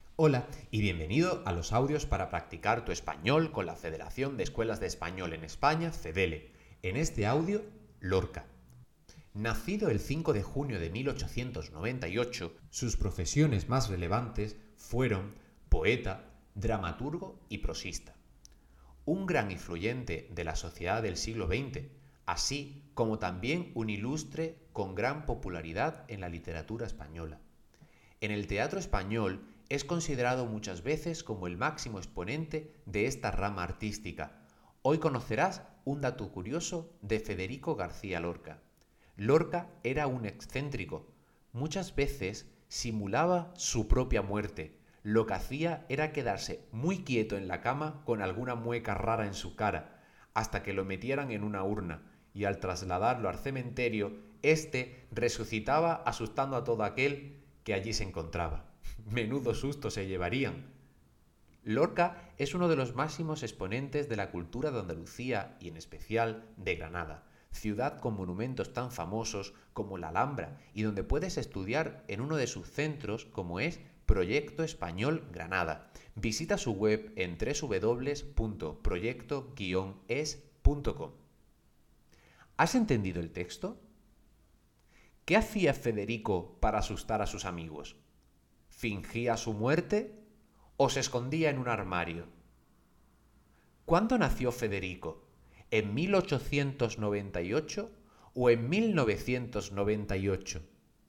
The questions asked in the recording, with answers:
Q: ¿Qué hacía Federico para asustar a sus amigos?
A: fingía su propia muerte

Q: ¿Cuándo nació Federico? ¿En 1898 o en 1998?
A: nació en 1898